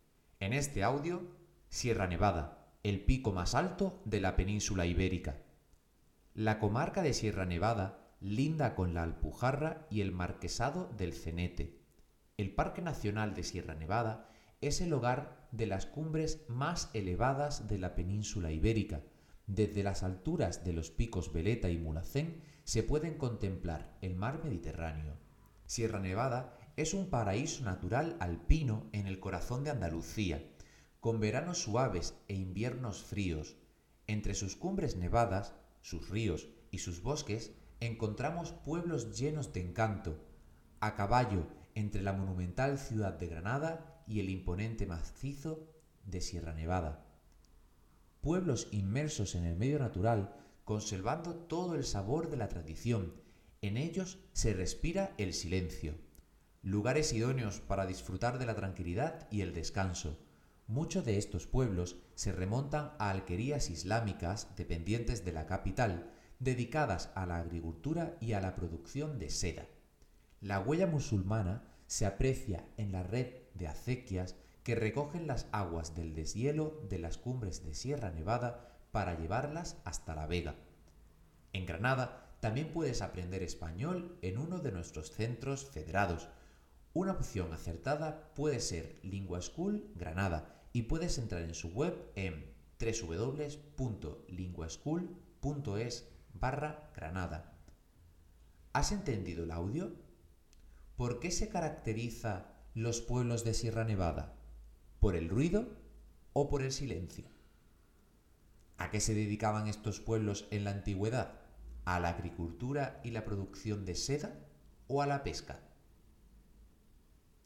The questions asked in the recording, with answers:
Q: ¿Por qué se caracteriza los pueblos de Sierra Nevada? ¿Por el ruido o por el silencio?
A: Se caracterizan por el silencio

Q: ¿A qué se dedicaban estos pueblos en la antigüedad? ¿A la agricultura y la producción de seda o a la pesca?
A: se dedicaban a la agricultura y la producción de seda